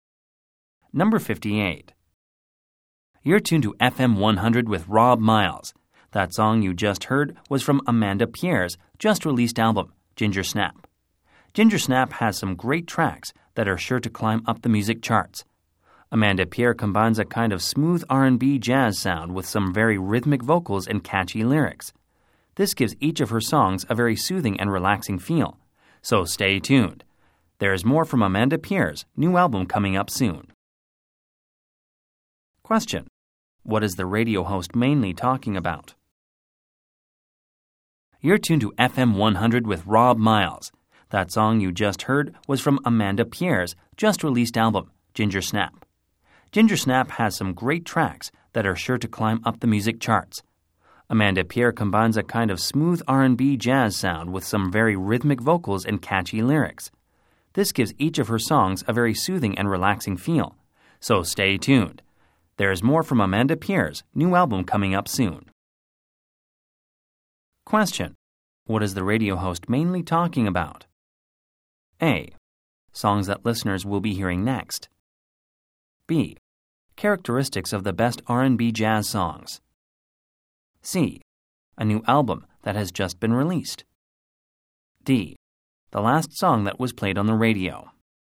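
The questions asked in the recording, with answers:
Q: What is the radio host mainly talking about?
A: C: A new album that has just been released.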